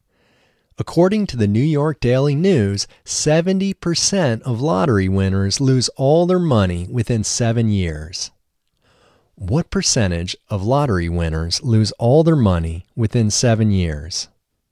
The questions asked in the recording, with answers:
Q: What percentage of lottery winners lose all their money within 7 years?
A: 70% of lottery winners lose all their money within 7 years.